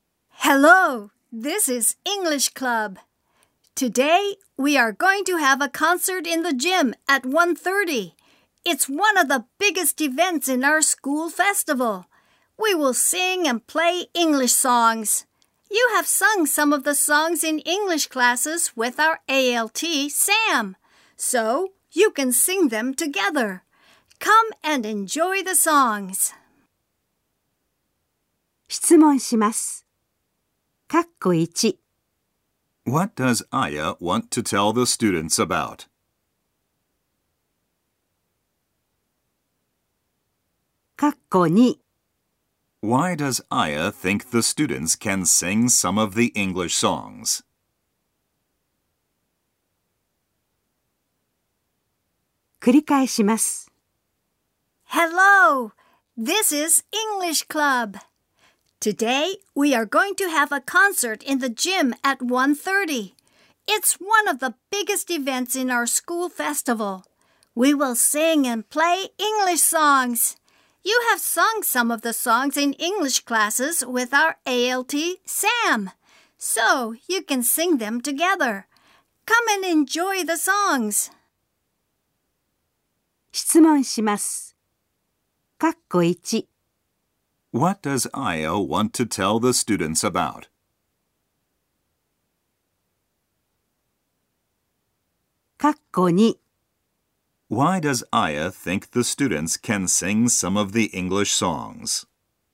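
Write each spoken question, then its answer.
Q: What does Aya want to tell the students about?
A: A concert in the gym at 1:30 at the school festival

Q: Why does Aya think the students can sing some of the English songs?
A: Because they have sung them in English classes with their ALT, Sam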